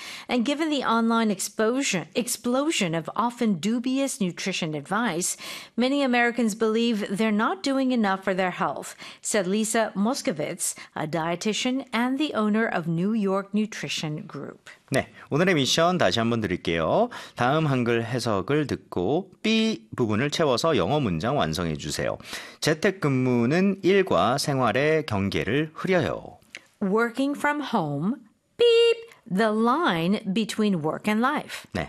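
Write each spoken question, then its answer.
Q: Working from home, beep, the line between work and life.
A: blurs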